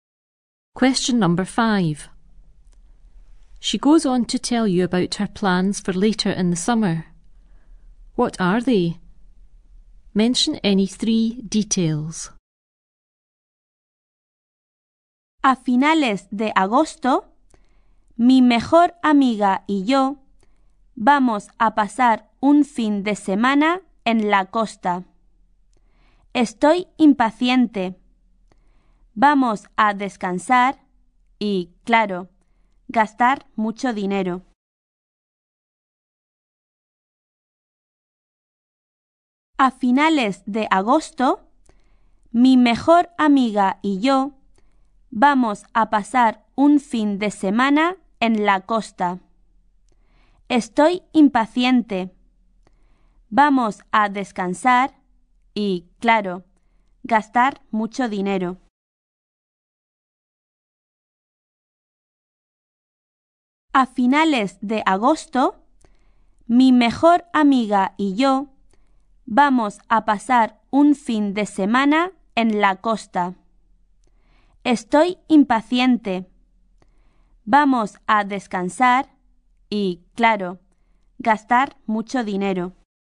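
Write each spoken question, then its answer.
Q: What are they?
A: At the end of August, a weekend at the coast with her best friend, to rest and spend lots of money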